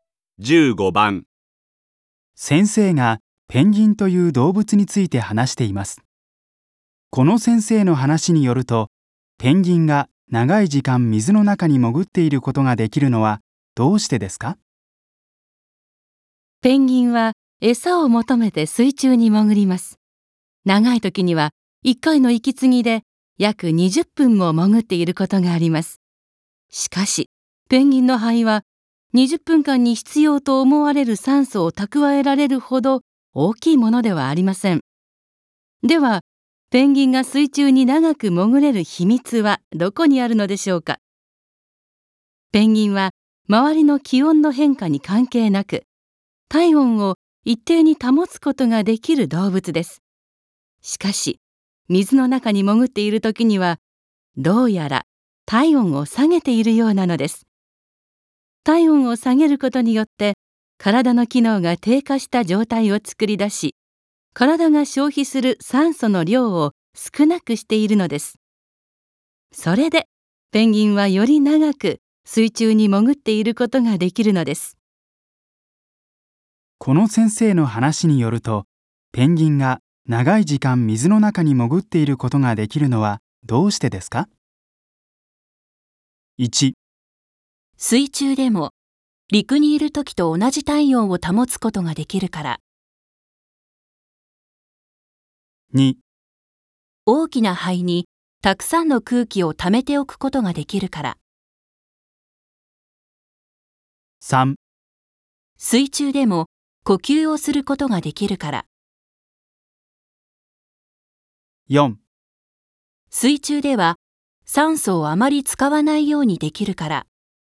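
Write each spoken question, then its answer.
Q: この先生の話によると、ペンギンが長い時間水の中に潜っていることができるのはどうしてですか?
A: 4: 水中では酸素をあまり使わないようにできるから。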